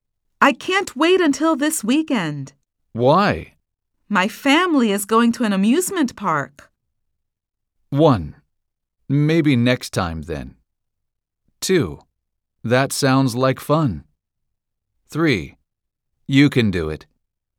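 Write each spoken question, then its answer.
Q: My family is going to an amusement park.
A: 2: That sounds like fun.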